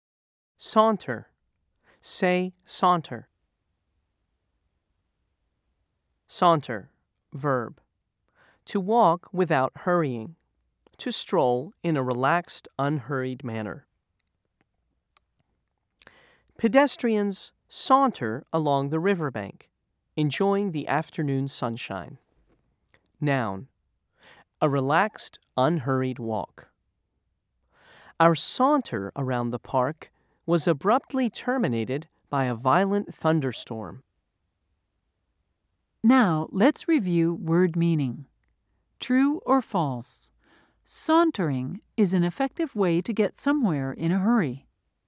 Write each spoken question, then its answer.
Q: True or false? Sauntering is an effective way to get somewhere in a hurry.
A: If you said false, you're right.